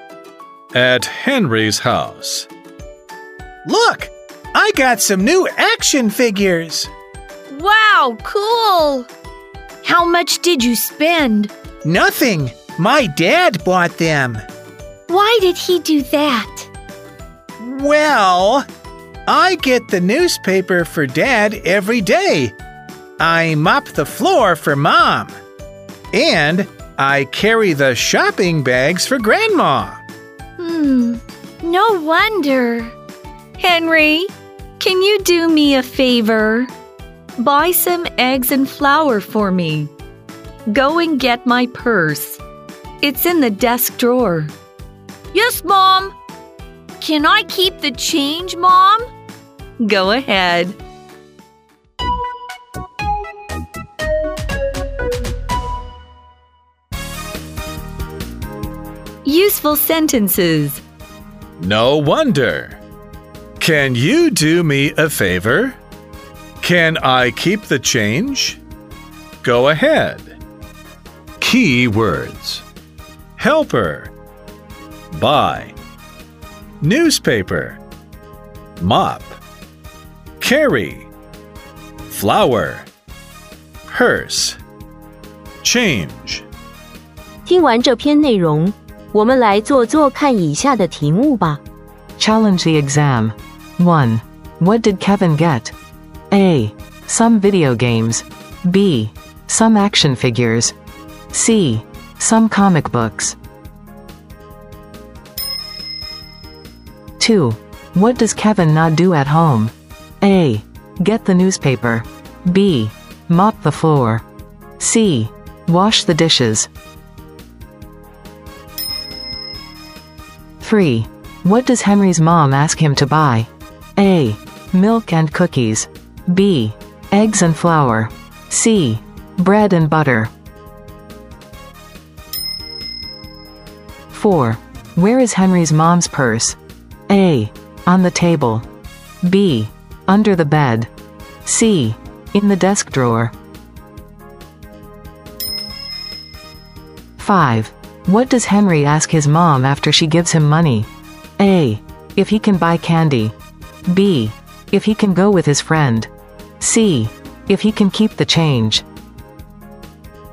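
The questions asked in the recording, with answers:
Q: What did Kevin get?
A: B: Some action figures.

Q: What does Kevin not do at home?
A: C: Wash the dishes.

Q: What does Henry's mom ask him to buy?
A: B: Eggs and flour.

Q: Where is Henry's mom's purse?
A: C: In the desk drawer.

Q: What does Henry ask his mom after she gives him money?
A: C: If he can keep the change.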